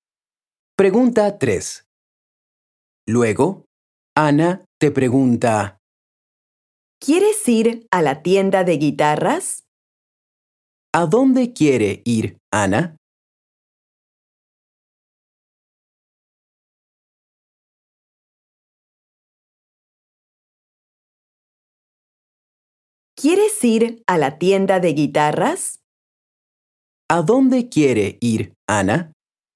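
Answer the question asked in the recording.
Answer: A la tienda de guitarras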